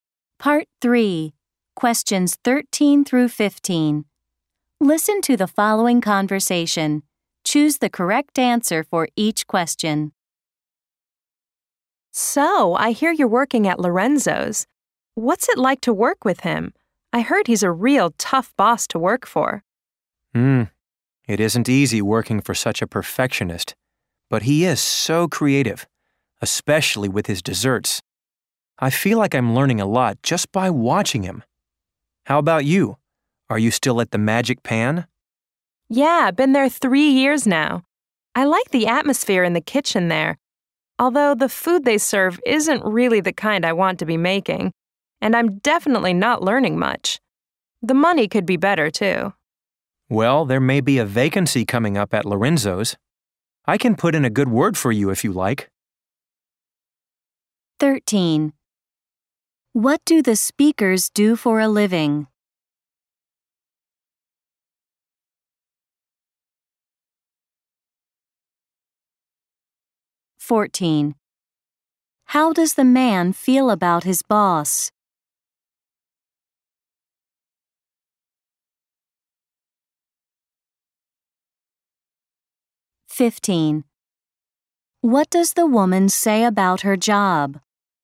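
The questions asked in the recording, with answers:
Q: What do the speakers do for a living?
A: They are cooks (chefs) in restaurants.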